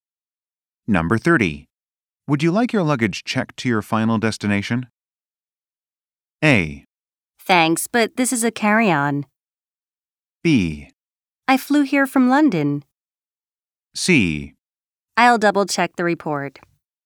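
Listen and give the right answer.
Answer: A: Thanks, but this is a carry-on.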